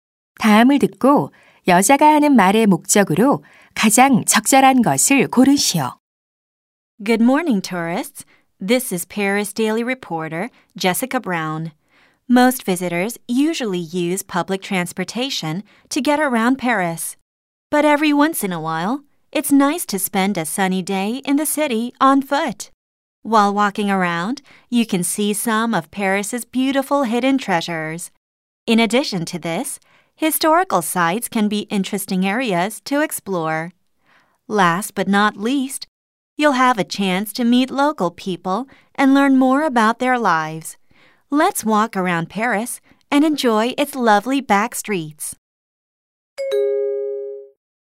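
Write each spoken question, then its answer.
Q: 다음을 듣고 여자가 하는 말의 목적으로 가장 적절한 것을 고르시오.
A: 파리를 걸어서 관광하도록 권장하려고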